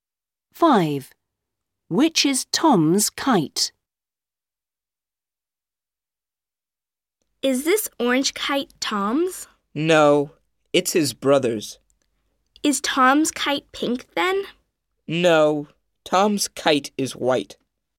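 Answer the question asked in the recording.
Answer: The white kite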